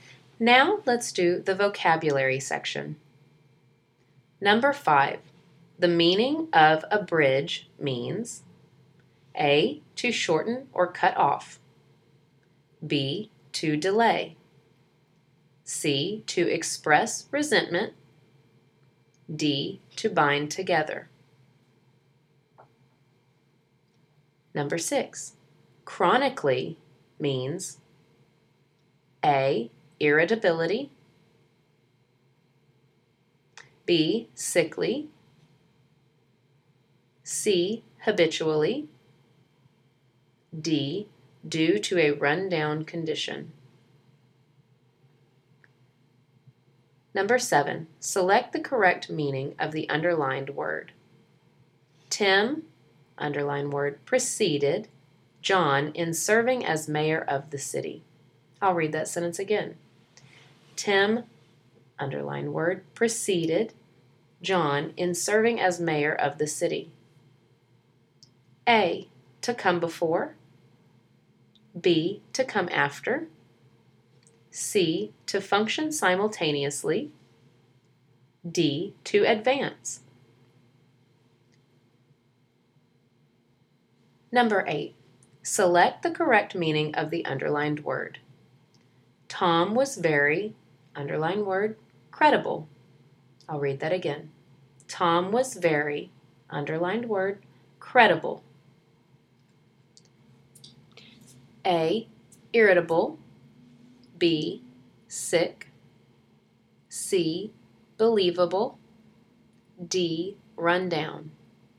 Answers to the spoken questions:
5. The answer to number 5 is A, abridge, means to shorten or cut off.
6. The answer to number 6 is C, chronically, means habitually.
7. The answer to number 7 is A, preceded, means to come before.
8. And the answer to number 8 is C, credible, means believable.